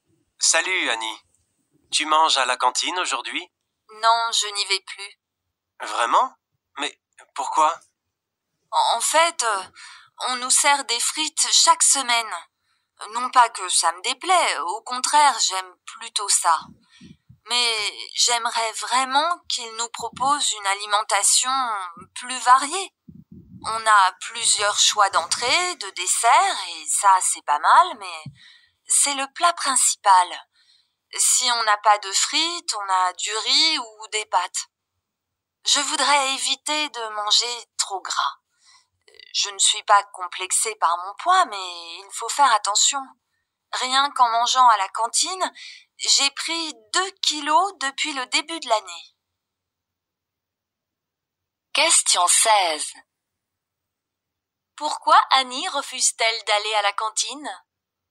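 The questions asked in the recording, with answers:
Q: Pourquoi Annie refuse-t-elle d'aller à la cantine ?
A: Parce que les repas ne sont pas assez variés (trop de frites, trop gras).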